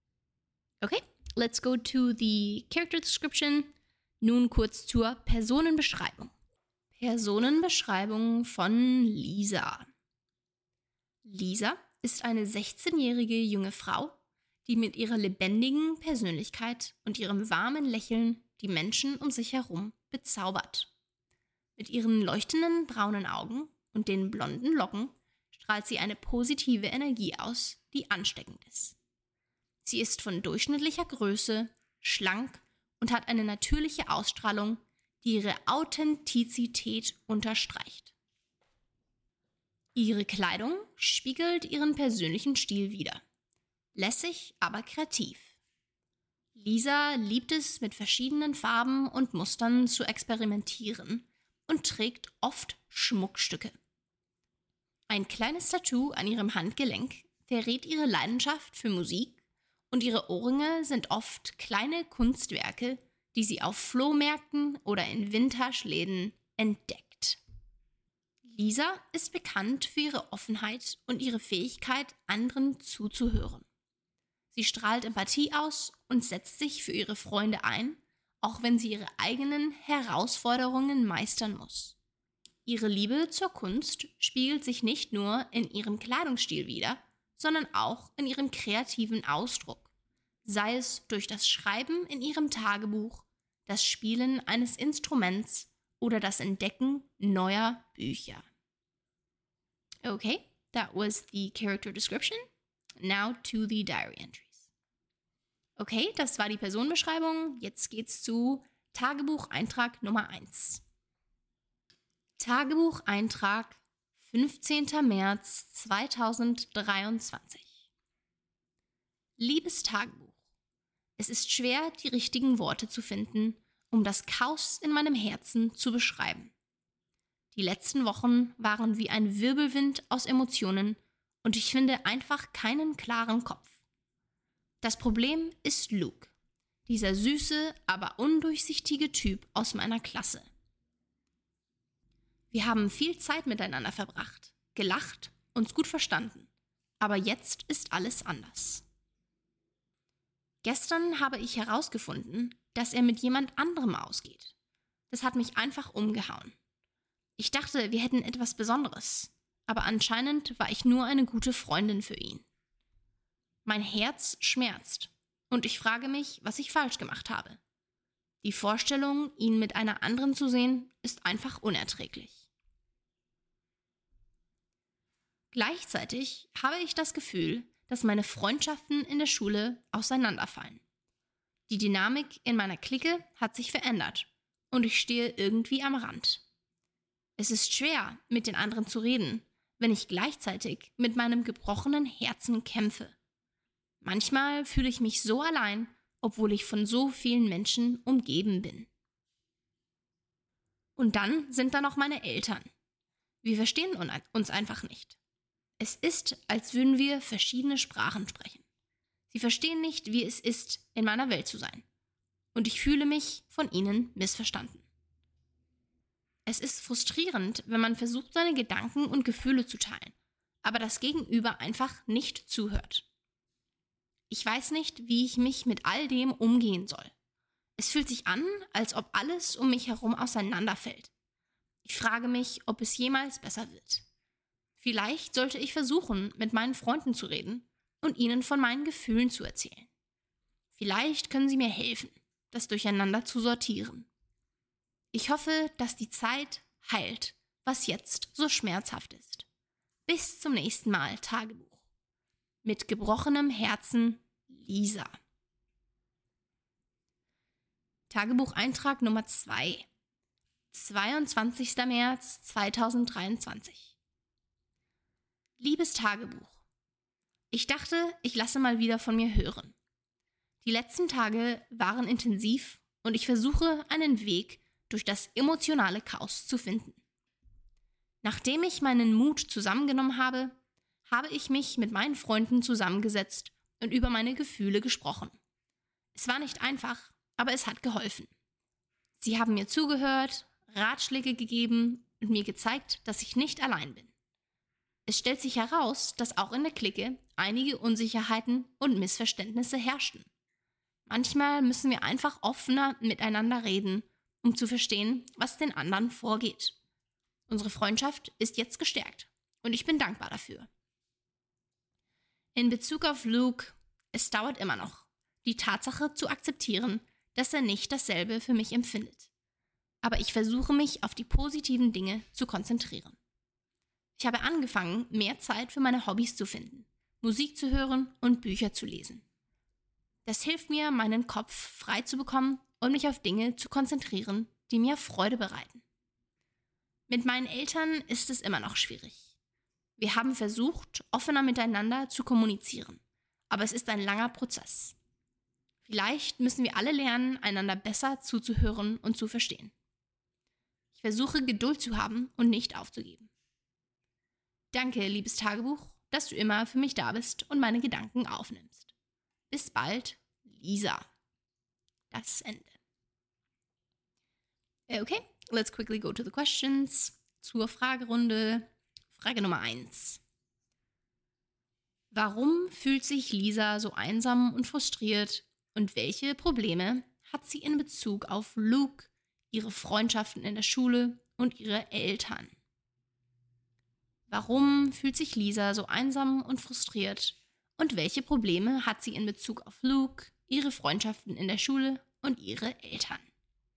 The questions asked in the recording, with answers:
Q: Warum fühlt sich Lisa so einsam und frustriert und welche Probleme hat sie in Bezug auf Luke, ihre Freundschaften in der Schule und ihre Eltern?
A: Lisa fühlt sich einsam und frustriert, weil sie entdeckt hat, dass Luke, ein Typ aus ihrer Klasse, mit jemand anderem ausgeht, obwohl sie dachte, dass zwischen ihnen etwas Besonderes war.